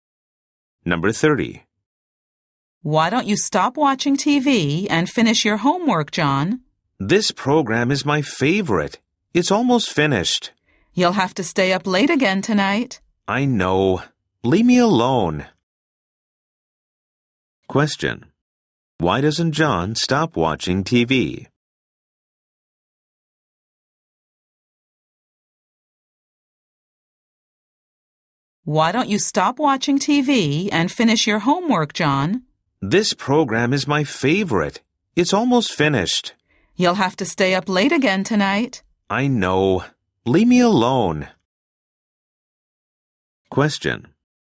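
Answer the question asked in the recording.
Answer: The program is his favorite and it's almost finished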